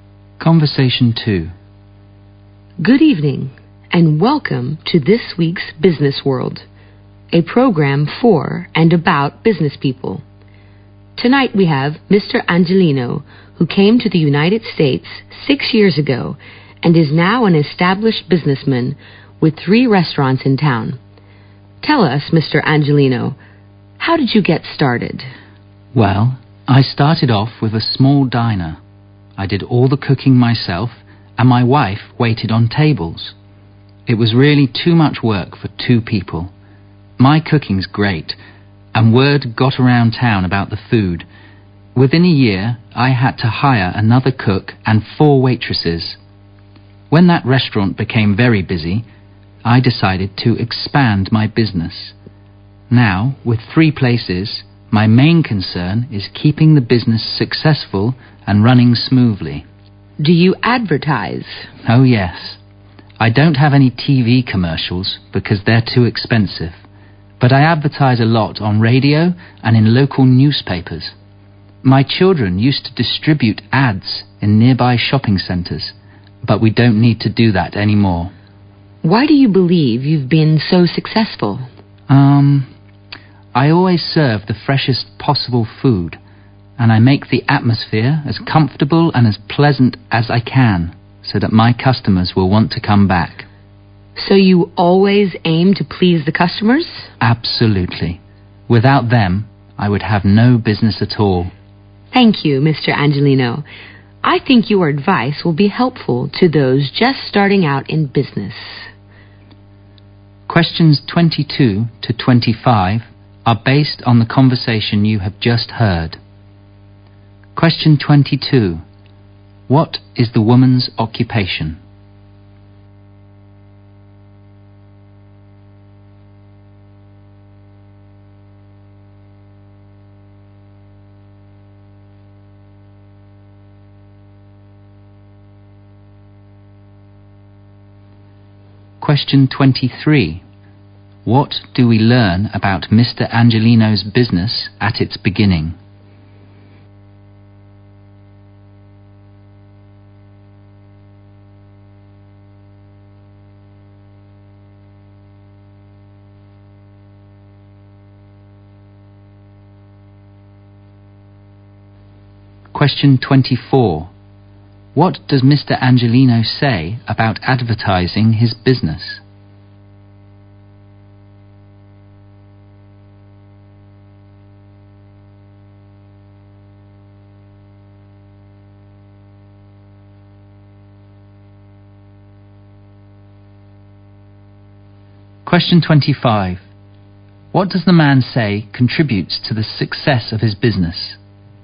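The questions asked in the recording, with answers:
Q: What is the woman's occupation?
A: She hosts a radio/TV program.

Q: What do we learn about Mr. Angelino's business at its beginning?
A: It was a small diner run by him and his wife, which was too much work for two people.

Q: What does Mr. Angelino say about advertising his business?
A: He advertises on radio and in local newspapers, not on TV.

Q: What does the man say contributes to the success of his business?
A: Fresh food and a comfortable, pleasant atmosphere that pleases customers.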